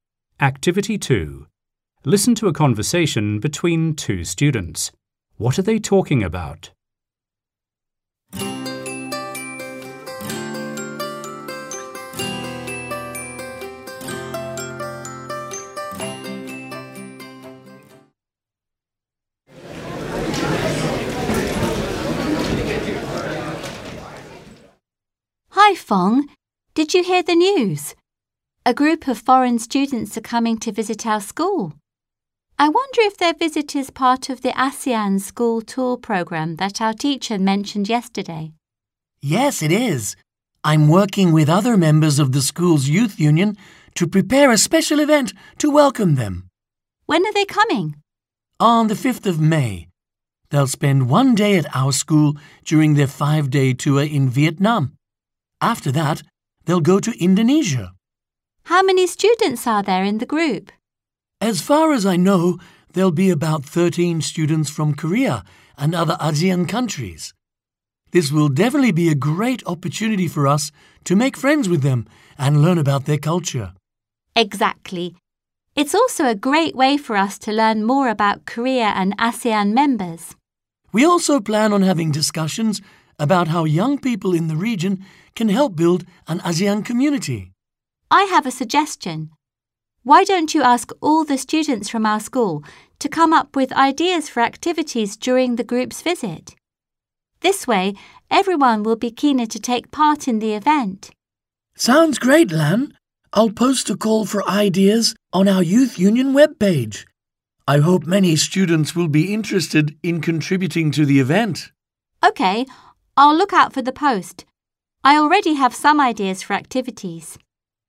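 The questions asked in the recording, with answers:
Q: What are they talking about?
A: A visit by a group of foreign students to their school as part of the ASEAN School Tour Program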